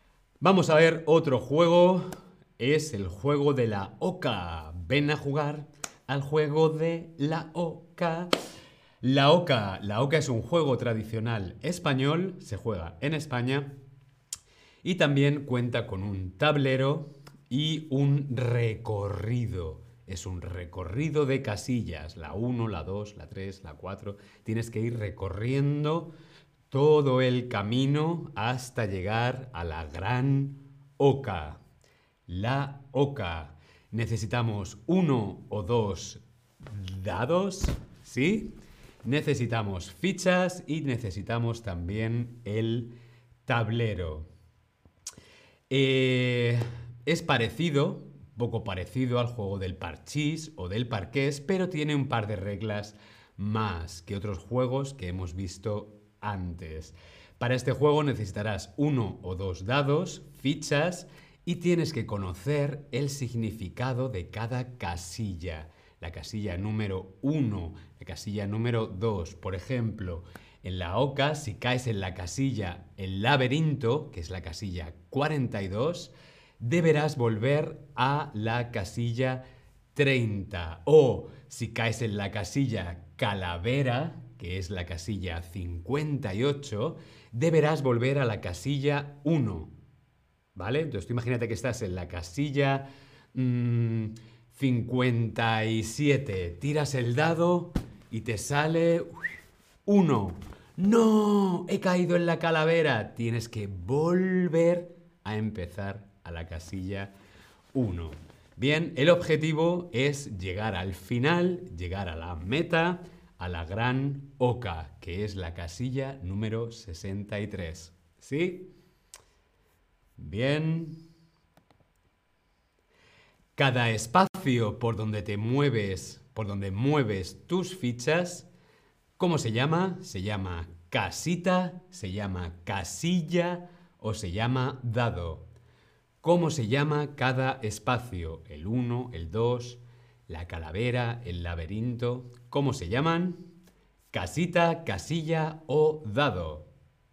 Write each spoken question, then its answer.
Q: Cada espacio por donde te mueves, por donde mueves tus fichas, ¿cómo se llama?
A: Muy bien, casilla.